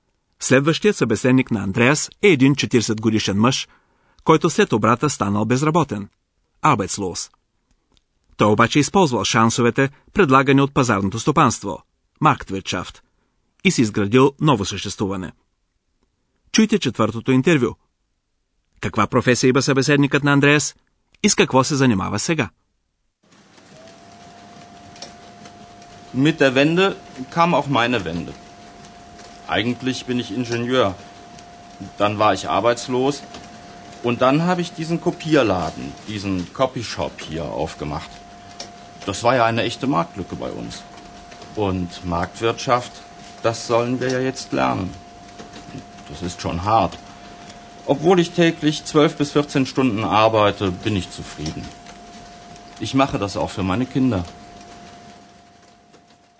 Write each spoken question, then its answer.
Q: Каква професия има събеседникът на Андреас и с какво се занимава сега?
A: По професия, интервюираният е инженер.